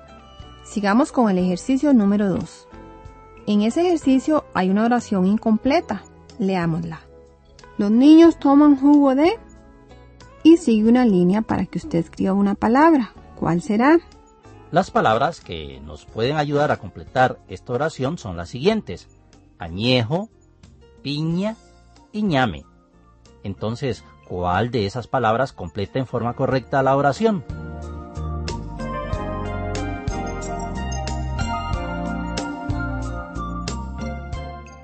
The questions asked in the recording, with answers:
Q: Añejo, piña y ñame. Entonces, ¿cuál de esas palabras completa en forma correcta la oración?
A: Efectivamente, la palabra que completa en forma correcta la oración es piña.